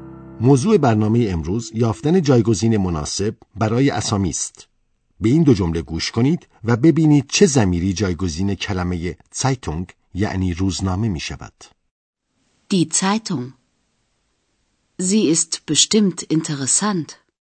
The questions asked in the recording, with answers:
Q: به این دو جمله گوش کنید و ببینید چه زمیری جایگزین کلمه سایتونگ یعنی روزنامه می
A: همان که شنیدیم زمیر زی جایگزین کلمه سایتونگ شده است.